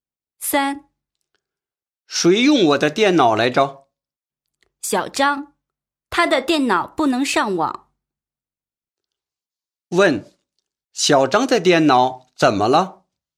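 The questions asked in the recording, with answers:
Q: 问,小张的电脑怎么了?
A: 不能上网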